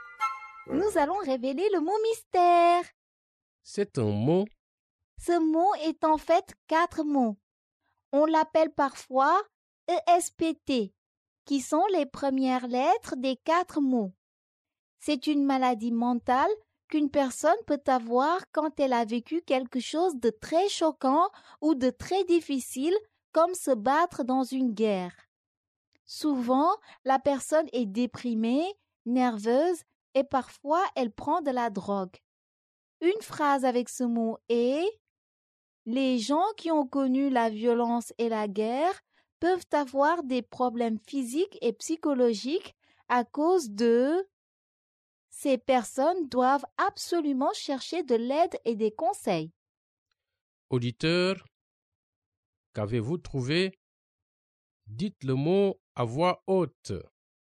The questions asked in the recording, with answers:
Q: Auditeur, qu'avez-vous trouvé?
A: État de stress post-traumatique.